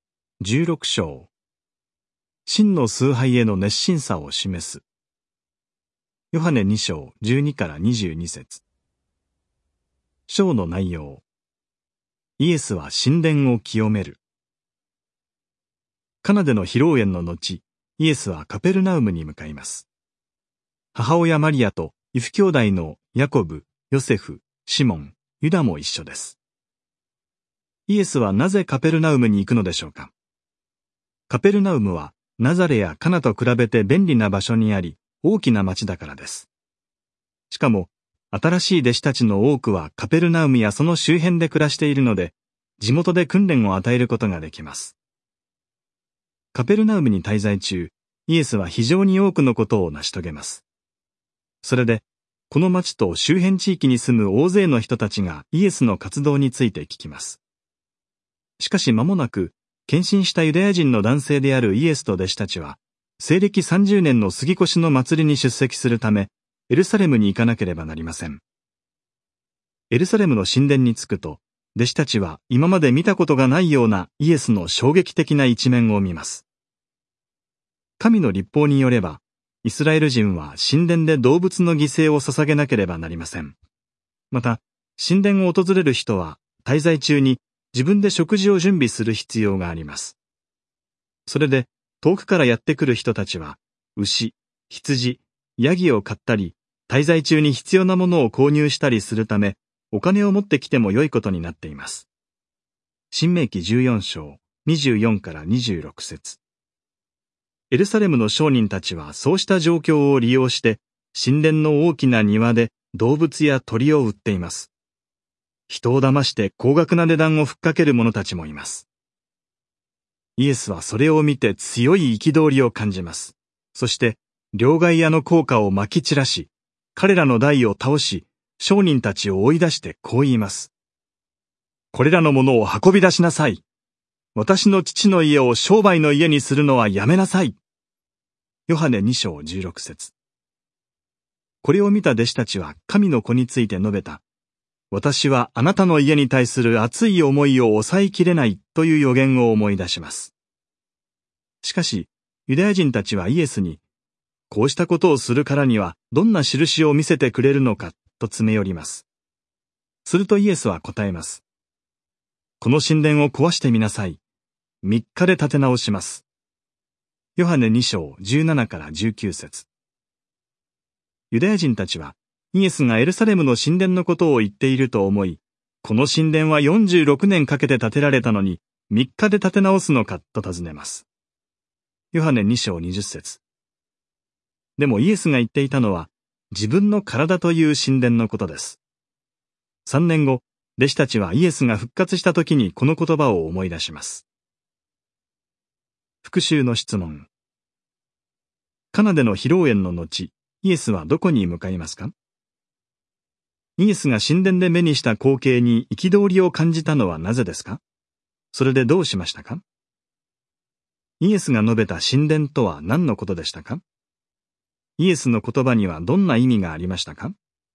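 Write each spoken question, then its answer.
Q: カナでの披露宴の後、イエスはどこに向かいますか?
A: カペルナウム

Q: イエスが神殿で目にした光景に憤りを感じたのはなぜですか?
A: 商人たちが神殿の庭で動物や鳥を売り、人を騙して高額な値段をふっかけていたから

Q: それでどうしましたか?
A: 両替屋の硬貨を撒き散らし、台を倒し、商人たちを追い出した

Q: イエスが述べた神殿とは何のことでしたか?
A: 自分の体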